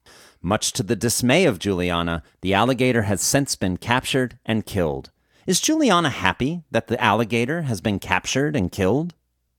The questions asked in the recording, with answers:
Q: Is Juliana happy that the alligator has been captured and killed?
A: No, Juliana isn't happy that the alligator has been captured and killed.